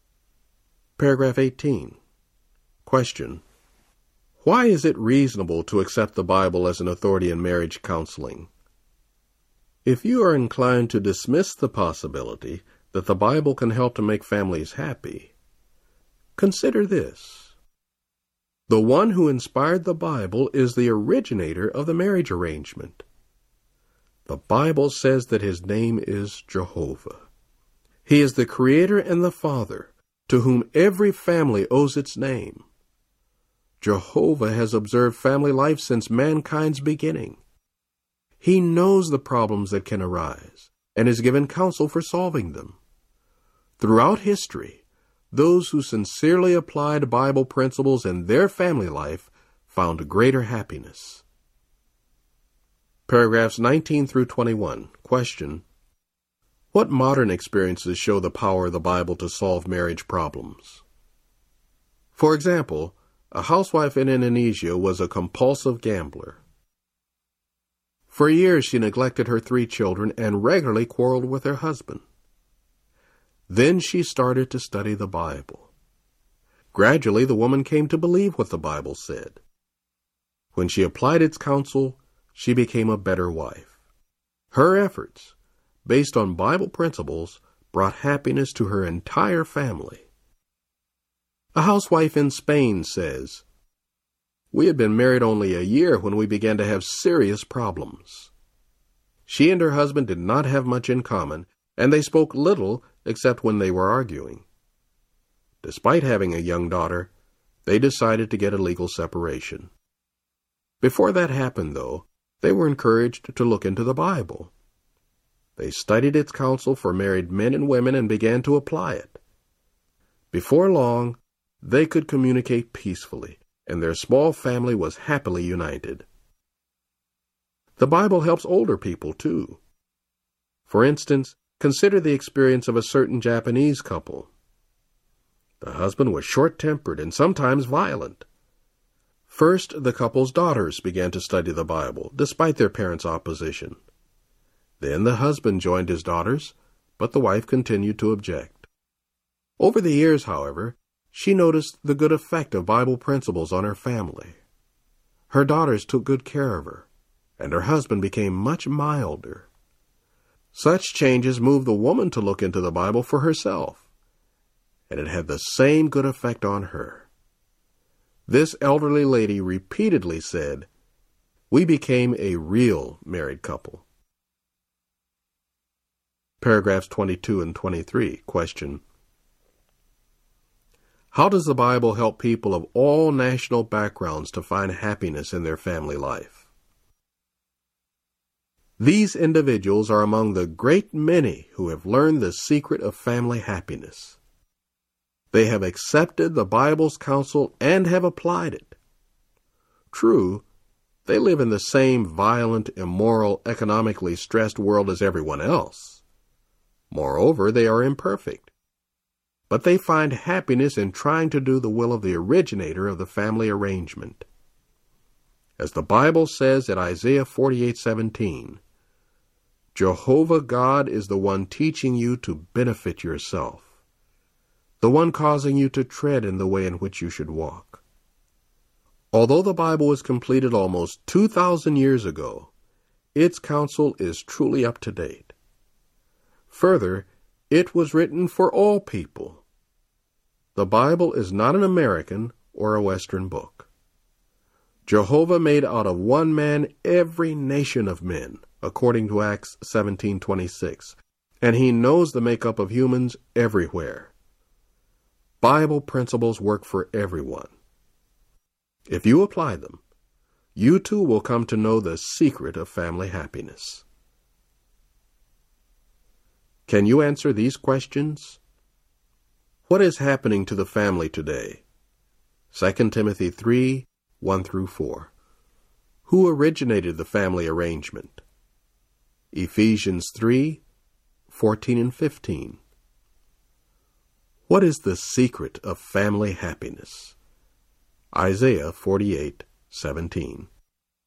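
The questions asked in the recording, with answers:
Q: Who originated the family arrangement?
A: Jehovah God

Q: What is the secret of family happiness?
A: Applying the Bible's counsel and principles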